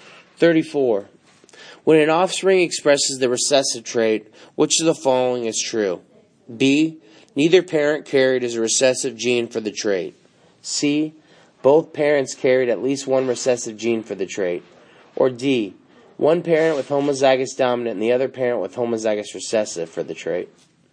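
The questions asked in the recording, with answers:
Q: When an offspring expresses the recessive trait, which of the following is true?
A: C: Both parents carried at least one recessive gene for the trait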